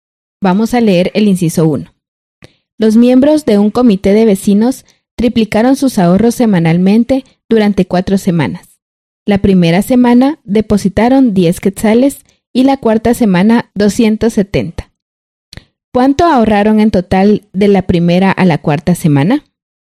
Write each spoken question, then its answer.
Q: ¿Cuánto ahorraron en total de la primera a la cuarta semana?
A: los miembros del comité ahorraron 400 quetzales.